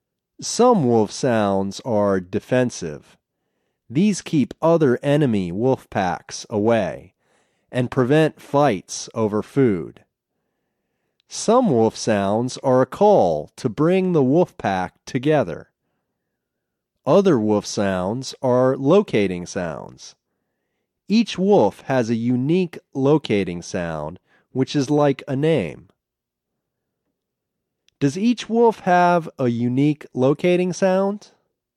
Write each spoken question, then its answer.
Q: Does each wolf have a unique locating sound?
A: Yes, each wolf has a unique locating sound.